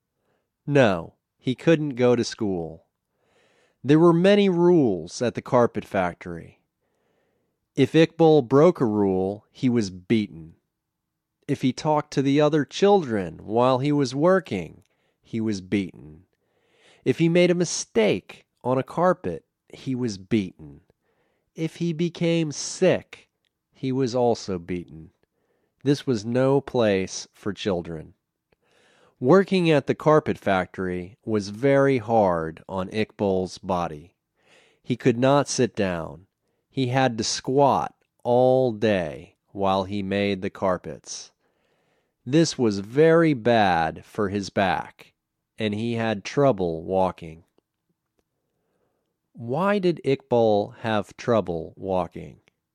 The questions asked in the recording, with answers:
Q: Why did Iqbal have trouble walking?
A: He could not sit down. He had to squat all day, and this was very bad for his back.